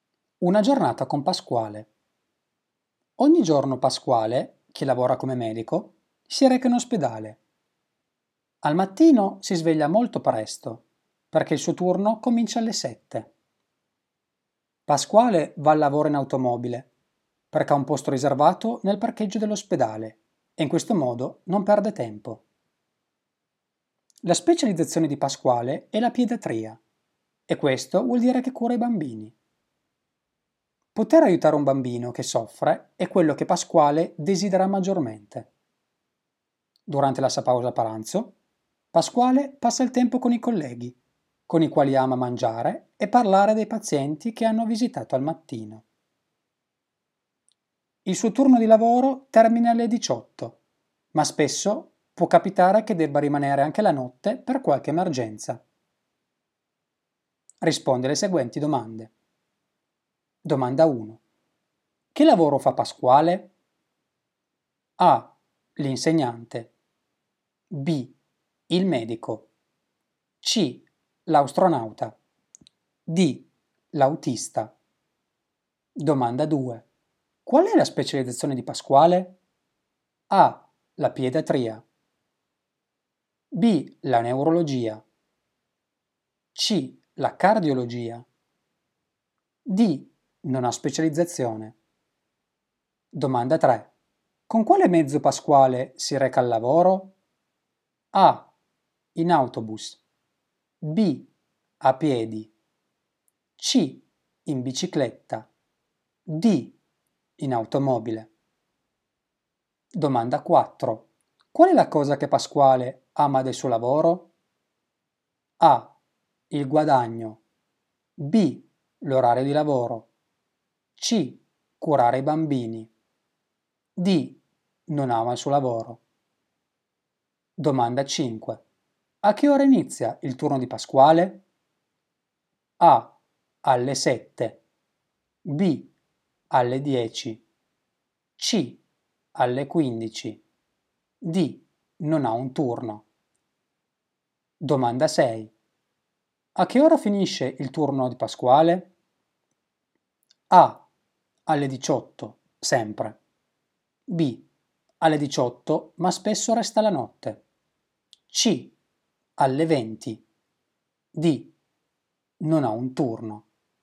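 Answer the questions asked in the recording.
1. B: Il medico.
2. A: La pediatria.
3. D: In automobile.
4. C: Curare i bambini.
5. A: Alle 7.
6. B: Alle 18, ma spesso resta la notte.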